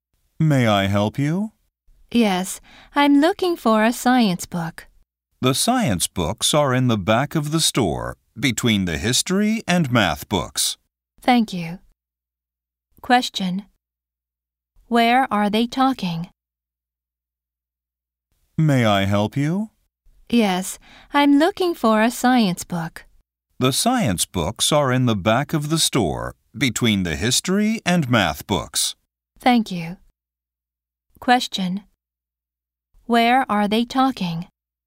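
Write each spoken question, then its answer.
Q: Where are they talking?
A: At a bookstore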